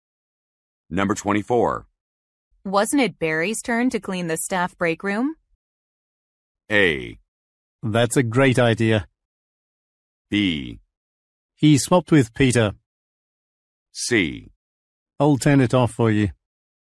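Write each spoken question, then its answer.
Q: Wasn't it Barry's turn to clean the staff break room?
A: B: He swapped with Peter.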